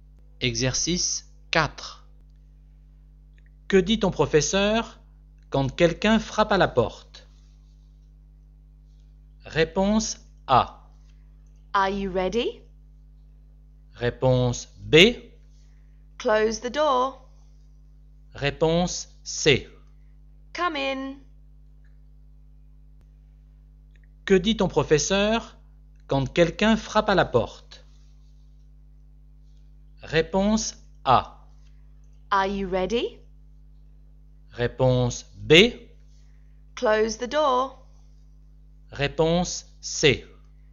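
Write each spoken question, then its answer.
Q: Que dit ton professeur quand quelqu'un frappe à la porte?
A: C: Come in.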